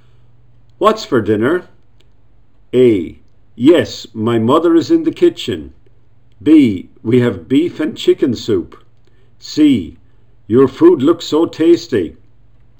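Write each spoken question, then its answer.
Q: What's for dinner?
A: B: We have beef and chicken soup.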